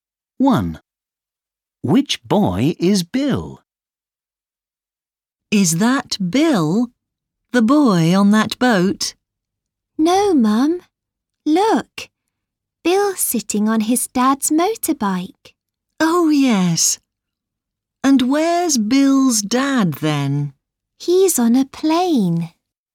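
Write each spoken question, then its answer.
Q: Which boy is Bill?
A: the boy sitting on his dad's motorbike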